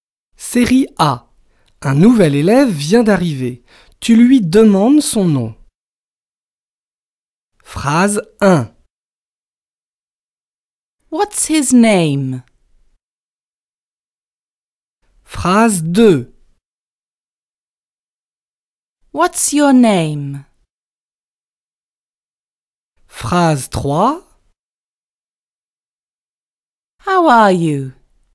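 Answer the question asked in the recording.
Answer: 2: What's your name?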